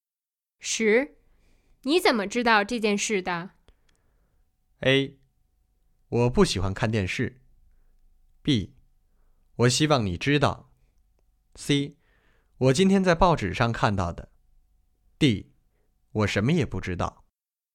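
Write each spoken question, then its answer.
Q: 你怎么知道这件事的?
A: C: 我今天在报纸上看到的。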